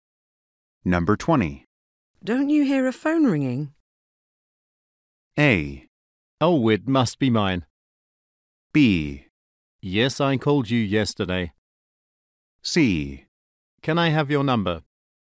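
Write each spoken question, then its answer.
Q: Don't you hear a phone ringing?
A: A: Oh, it must be mine.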